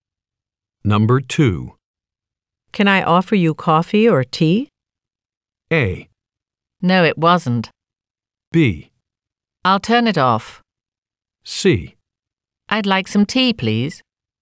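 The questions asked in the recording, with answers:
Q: Can I offer you coffee or tea?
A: C: I'd like some tea, please.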